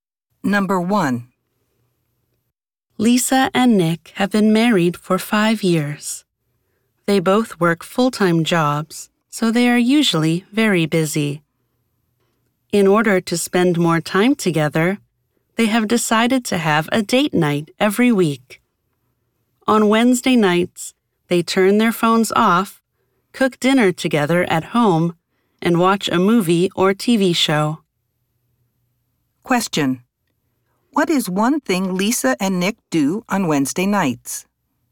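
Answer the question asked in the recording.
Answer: They turn their phones off, cook dinner together at home, and watch a movie or TV show.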